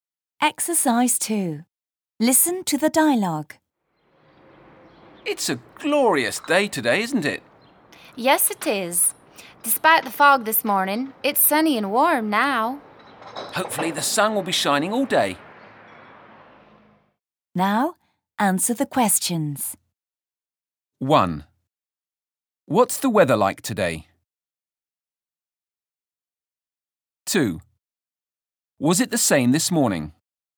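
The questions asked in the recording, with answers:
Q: What's the weather like today?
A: It's sunny and warm.

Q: Was it the same this morning?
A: No, it was foggy this morning.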